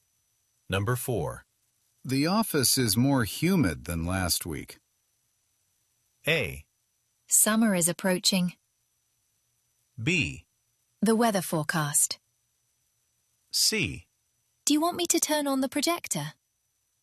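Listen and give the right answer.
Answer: A: Summer is approaching.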